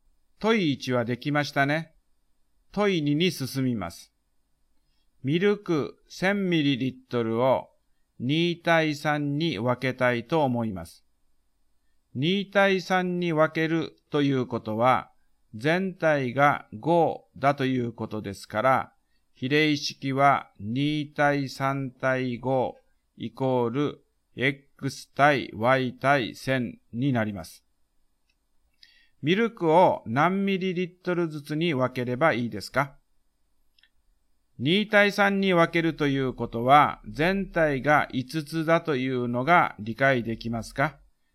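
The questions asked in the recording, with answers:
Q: ミルクを何ミリリットルずつに分ければいいですか?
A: 400mlと600ml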